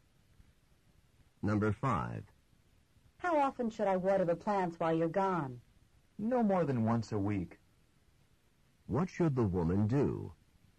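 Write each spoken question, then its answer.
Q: What should the woman do?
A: Water the plants once a week at most.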